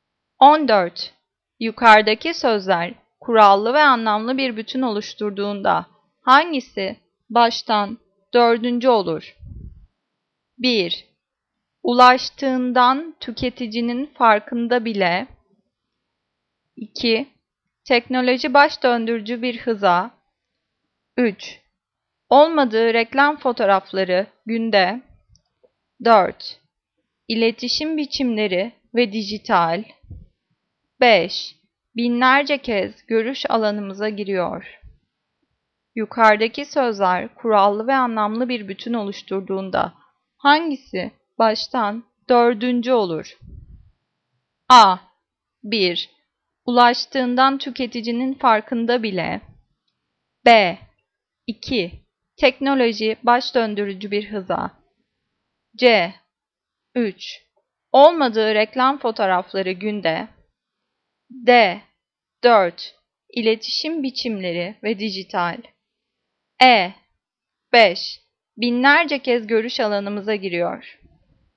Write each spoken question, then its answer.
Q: Yukarıdaki sözler kurallı ve anlamlı bir bütün oluşturduğunda hangisi baştan dördüncü olur?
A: Cevap C. 3. Olmadığı reklam fotoğrafları günde.